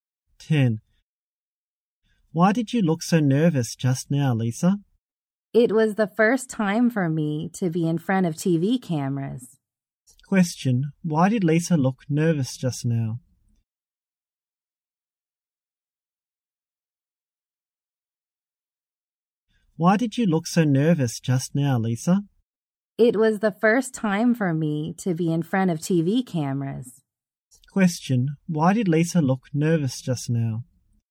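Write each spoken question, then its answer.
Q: Why did Lisa look nervous just now?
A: It was her first time in front of TV cameras.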